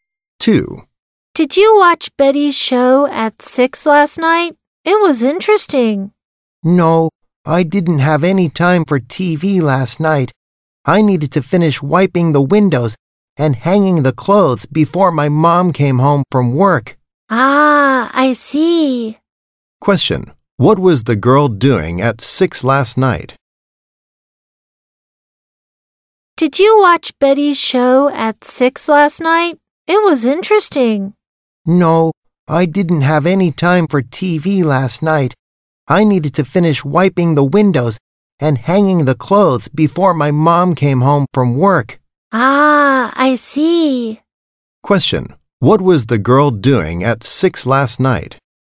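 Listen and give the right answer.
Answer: Wiping the windows and hanging the clothes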